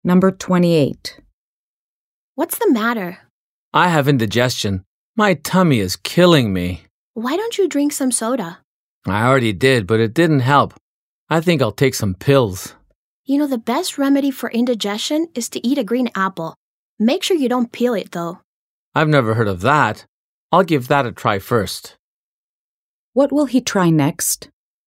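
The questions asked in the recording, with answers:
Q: What will he try next?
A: Eating a green apple without peeling it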